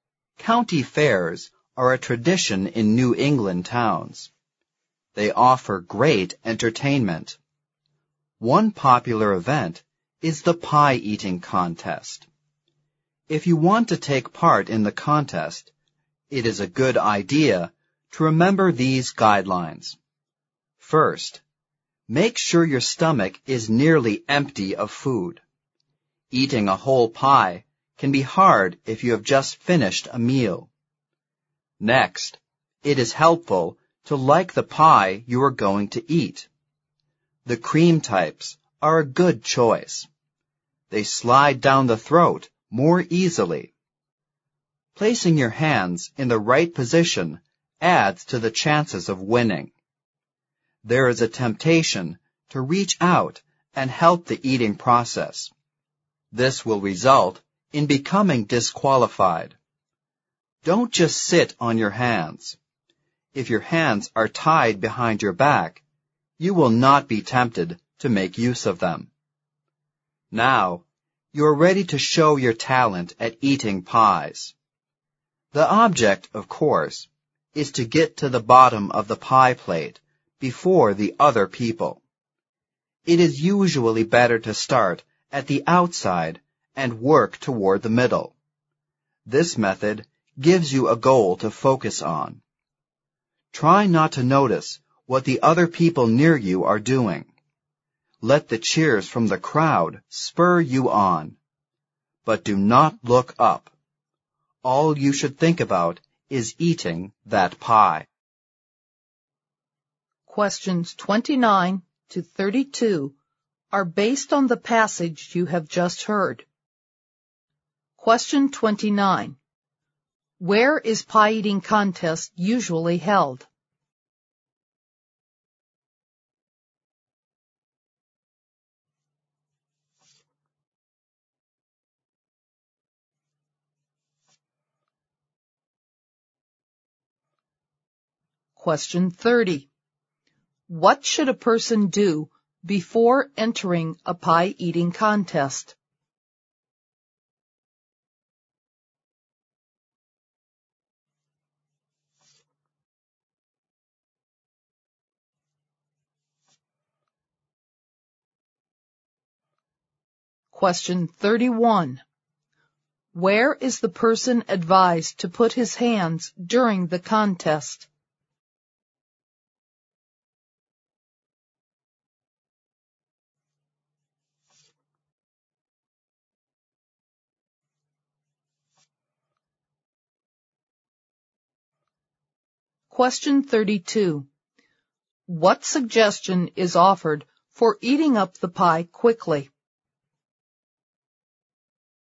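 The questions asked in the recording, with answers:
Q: Where is pie-eating contest usually held?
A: At county fairs in New England towns

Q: What should a person do before entering a pie-eating contest?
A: Make sure the stomach is nearly empty of food

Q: Where is the person advised to put his hands during the contest?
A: Tied behind his back

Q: What suggestion is offered for eating up the pie quickly?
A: Start at the outside and work toward the middle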